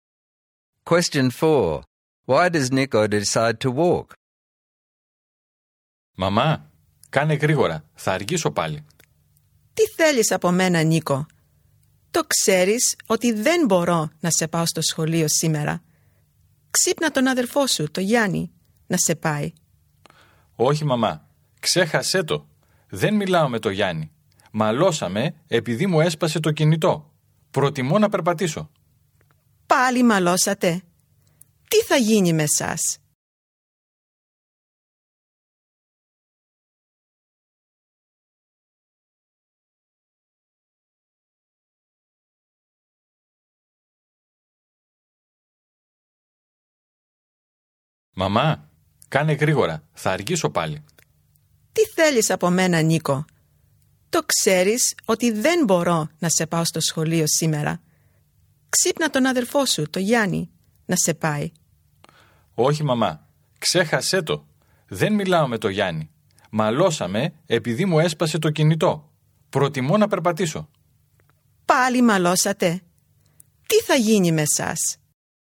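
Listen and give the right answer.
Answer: His mother can't take him, and he won't ask his brother Yianni because they fought after Yianni broke his mobile phone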